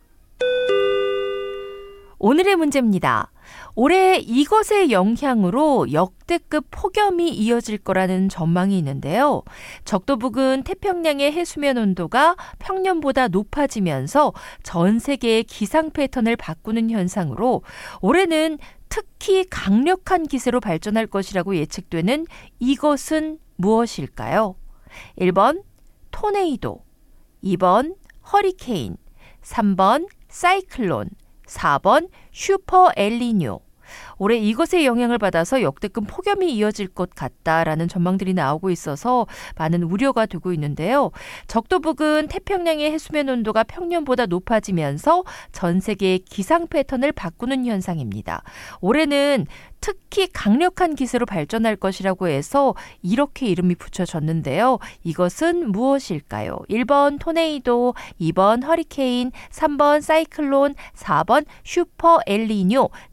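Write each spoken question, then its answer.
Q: 적도 부근 태평양의 해수면 온도가 평년보다 높아지면서 전 세계의 기상 패턴을 바꾸는 현상으로 올해는 특히 강력한 기세로 발전할 것이라고 예측되는 이것은 무엇일까요?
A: 4번: 슈퍼 엘니뇨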